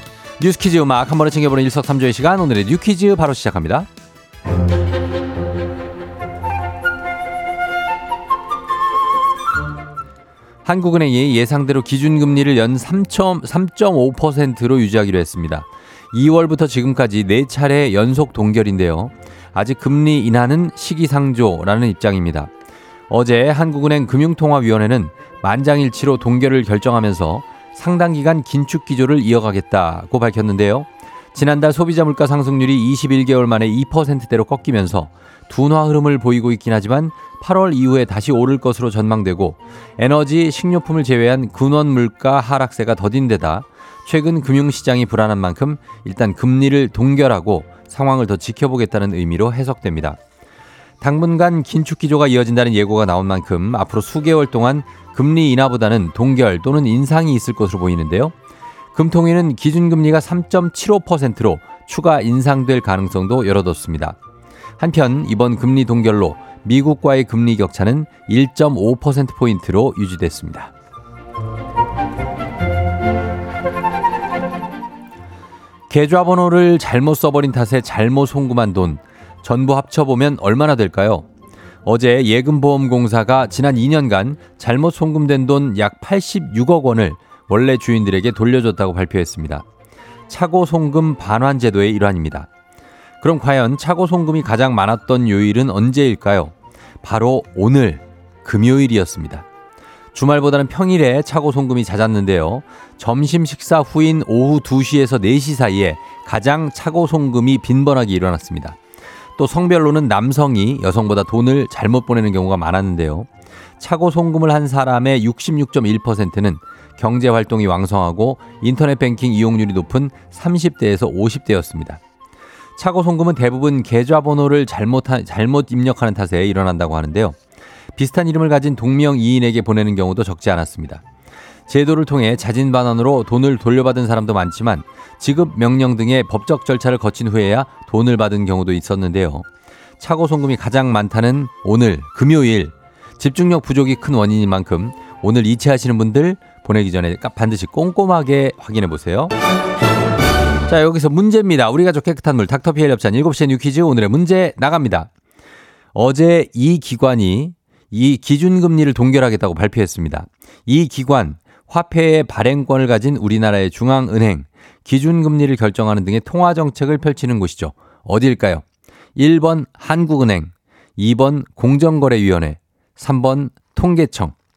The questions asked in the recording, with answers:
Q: 어디일까요? 1번 한국은행, 2번 공정거래위원회, 3번 통계청.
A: 정답은 1번 한국은행입니다.